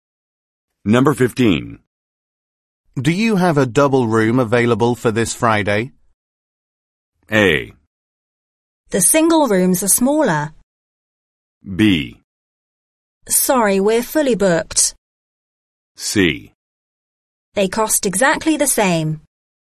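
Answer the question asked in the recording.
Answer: B: Sorry, we're fully booked.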